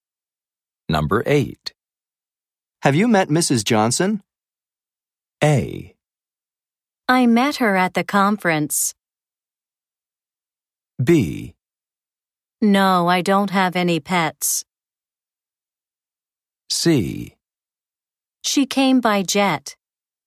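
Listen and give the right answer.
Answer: A: I met her at the conference.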